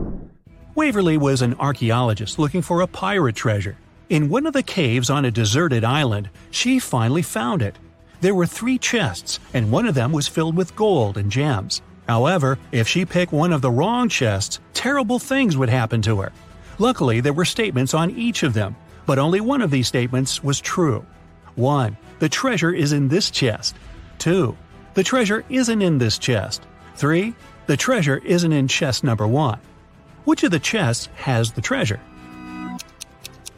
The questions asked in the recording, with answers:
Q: Which of the chests has the treasure?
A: Now there's no contradictions, and the treasure is in the second chest.